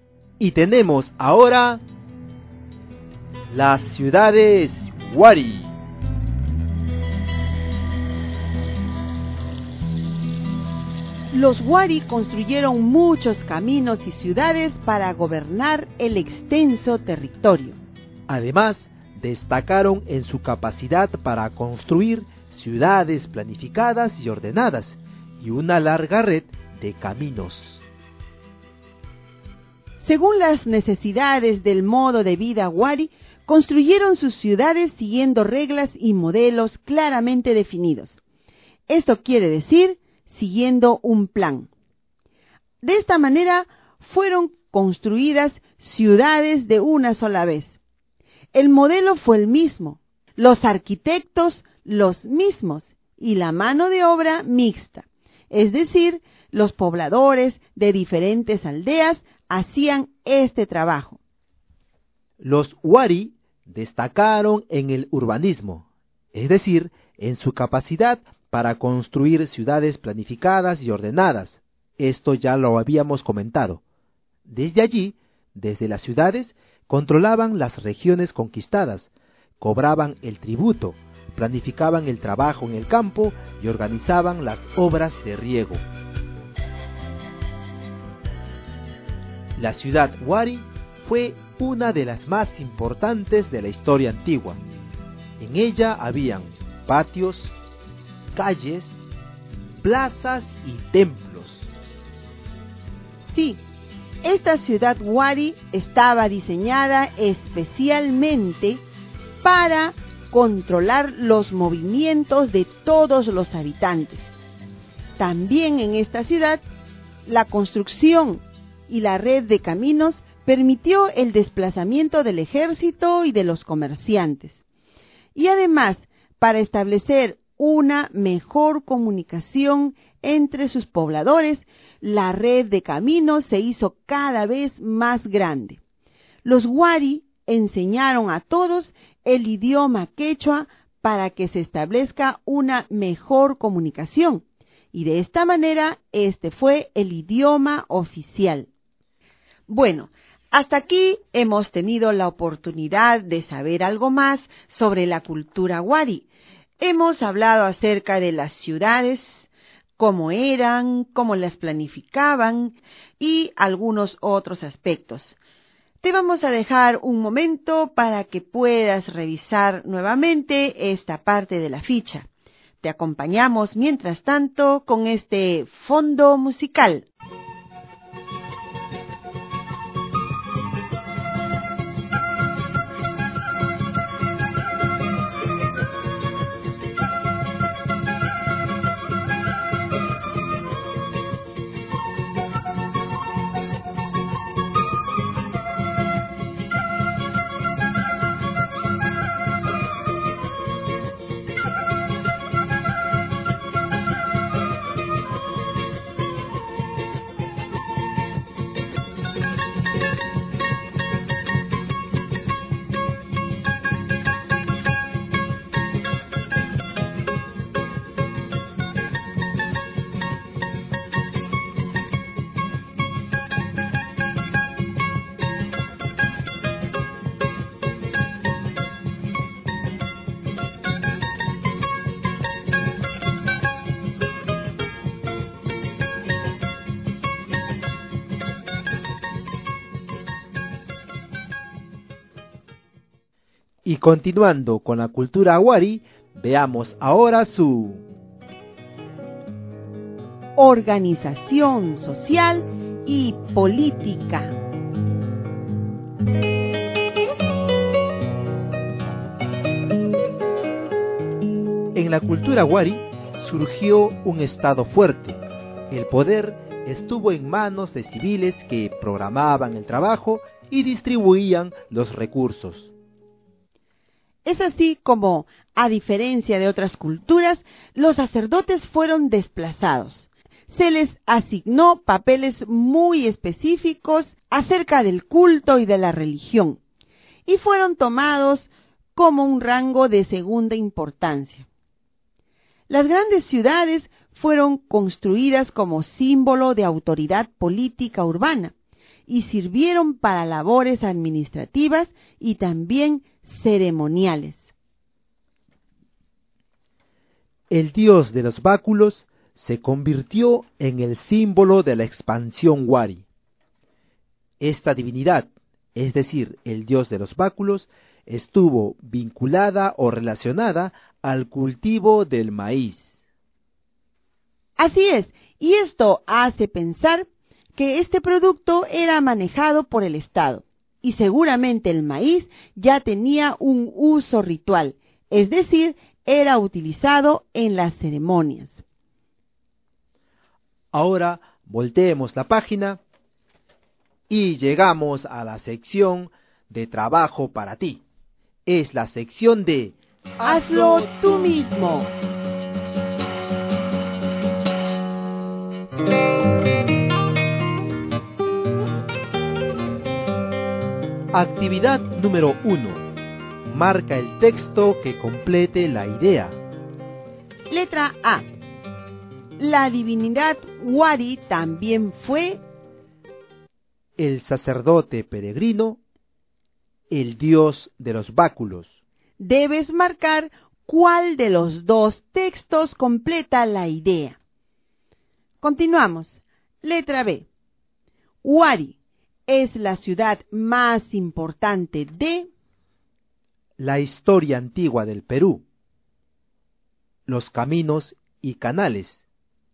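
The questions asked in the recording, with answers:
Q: La divinidad Wari también fue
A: el dios de los báculos

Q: Wari es la ciudad más importante de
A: la historia antigua del Perú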